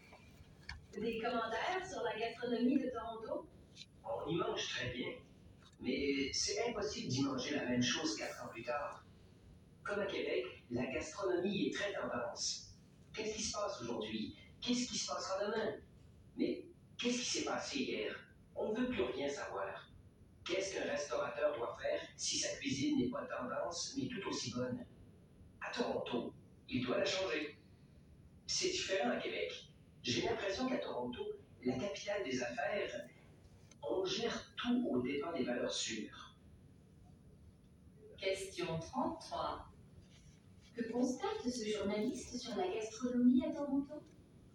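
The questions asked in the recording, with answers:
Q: Que constate ce journaliste sur la gastronomie à Toronto?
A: Elle change sans cesse et suit les tendances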